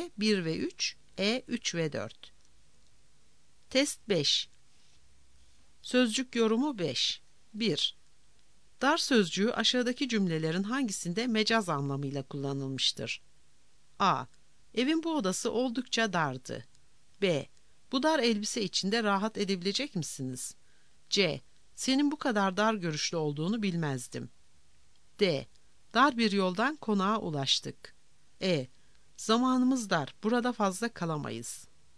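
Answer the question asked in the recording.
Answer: C: Senin bu kadar dar görüşlü olduğunu bilmezdim.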